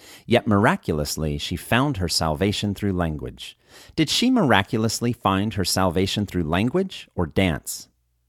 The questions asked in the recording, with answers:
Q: Did she miraculously find her salvation through language or dance?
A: She miraculously found her salvation through language.